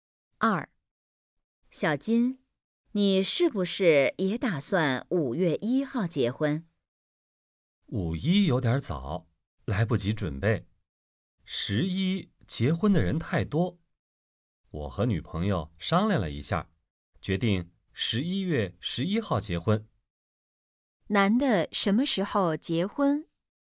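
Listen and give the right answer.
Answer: 11月11号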